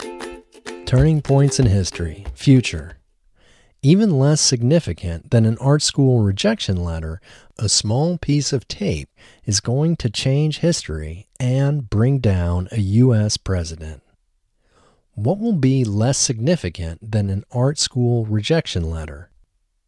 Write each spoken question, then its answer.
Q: What will be less significant than an art school rejection letter?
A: A small piece of tape will be less significant than an art school rejection letter.